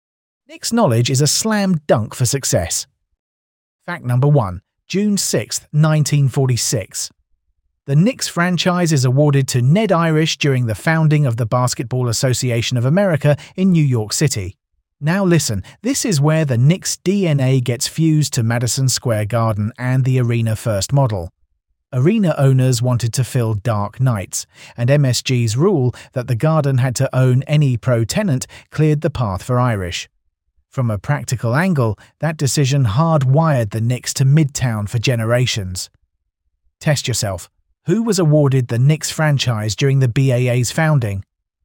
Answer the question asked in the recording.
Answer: Correct answer, Ned Irish.